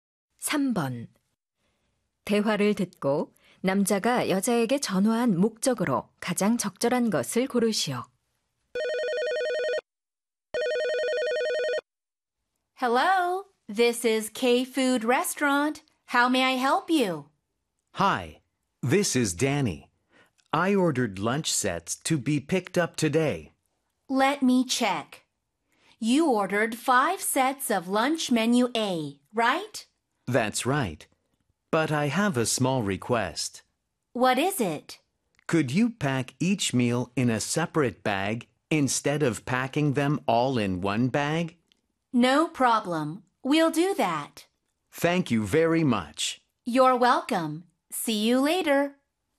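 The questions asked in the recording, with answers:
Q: 대화를 듣고 남자가 여자에게 전화한 목적으로 가장 적절한 것을 고르시오.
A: 주문한 점심 세트를 각각 따로 포장해 달라고 요청하려고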